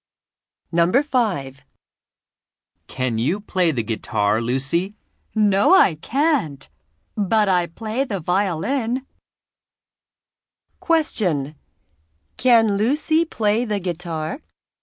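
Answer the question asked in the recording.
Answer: No, she can't.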